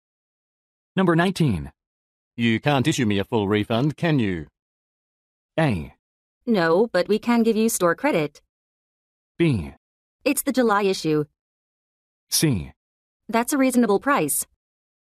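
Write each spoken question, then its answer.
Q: You can't issue me a full refund, can you?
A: A: No, but we can give you store credit.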